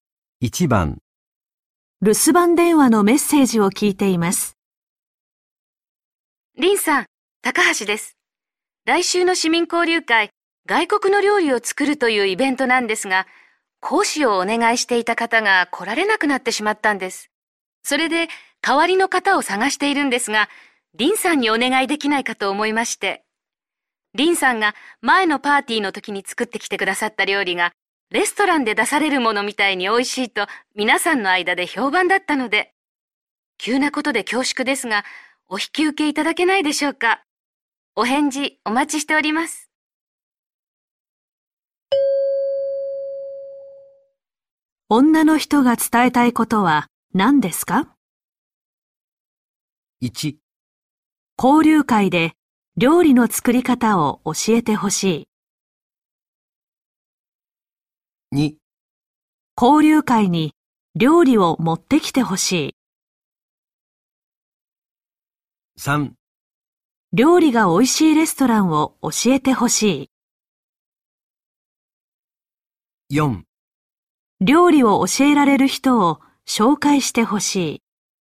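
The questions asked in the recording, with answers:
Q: 女の人が伝えたいことは何ですか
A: 1: 交流会で料理の作り方を教えてほしい。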